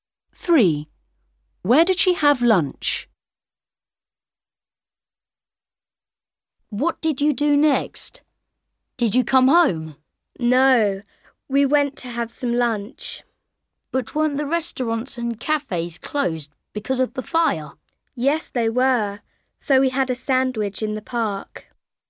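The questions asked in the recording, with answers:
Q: Where did she have lunch?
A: in the park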